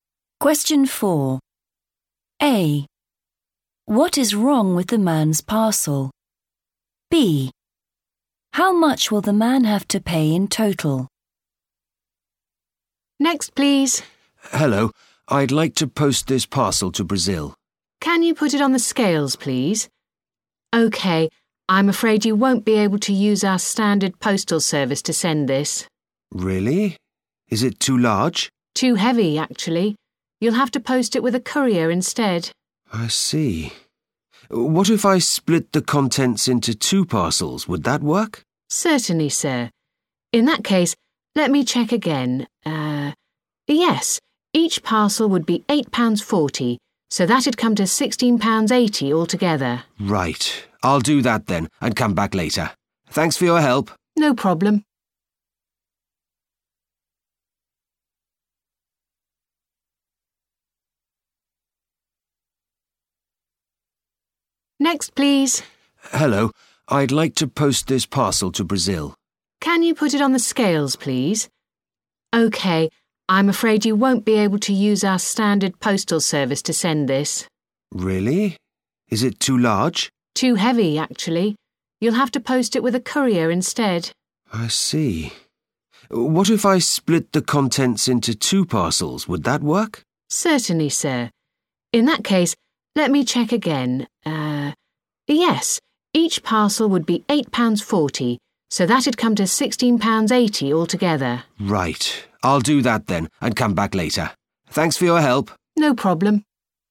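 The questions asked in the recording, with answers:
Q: What is wrong with the man's parcel?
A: too heavy

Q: How much will the man have to pay in total?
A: £16.80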